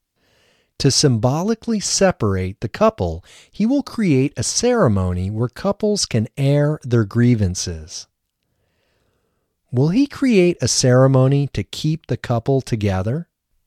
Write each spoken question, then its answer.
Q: Will he create a ceremony to keep the couple together?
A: No, he will not create a ceremony to keep the couple together.